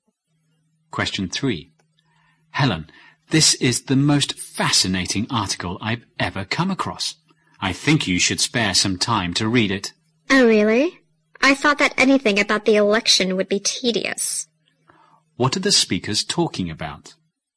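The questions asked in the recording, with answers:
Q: What are the speakers talking about?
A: An article about the election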